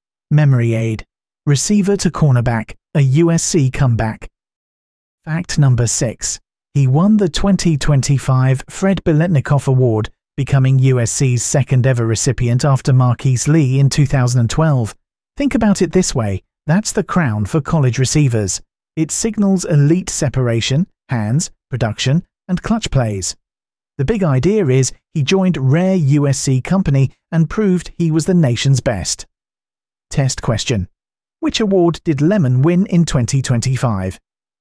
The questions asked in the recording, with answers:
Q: Which award did Lemon win in 2025?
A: Correct answer, Fred Biletnikoff Award.